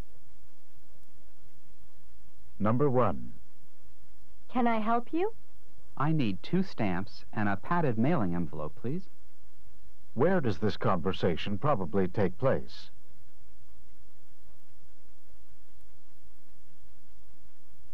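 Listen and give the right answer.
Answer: At a post office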